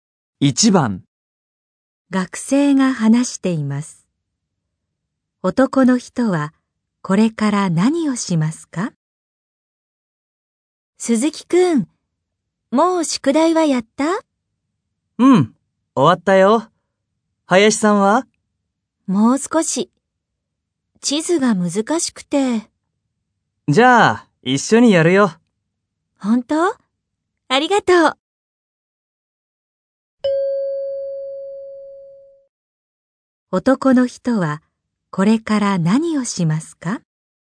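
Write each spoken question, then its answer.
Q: 男の人はこれから何をしますか?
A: 林さんと一緒に宿題(地図)をやる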